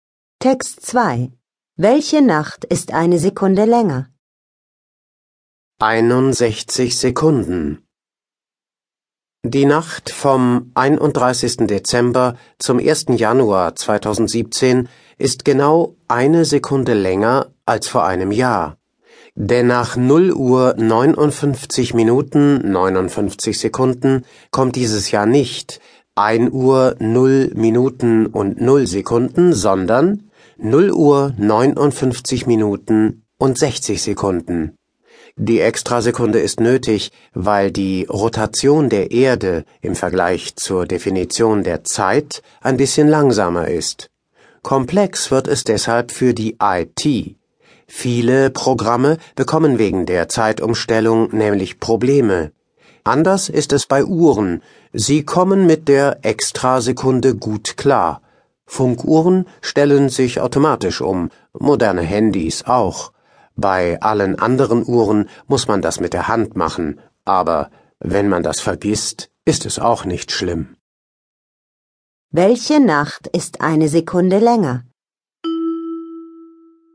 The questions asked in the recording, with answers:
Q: Welche Nacht ist eine Sekunde länger?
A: Die Nacht vom 31. Dezember zum 1. Januar 2017